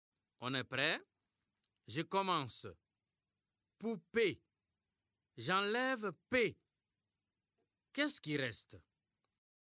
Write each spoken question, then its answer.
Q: Poupée. J'enlève P. Qu'est-ce qui reste?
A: Monsieur, il reste pou.